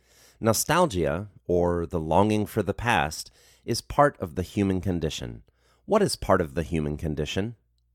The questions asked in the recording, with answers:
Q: What is part of the human condition?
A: Nostalgia is part of the human condition.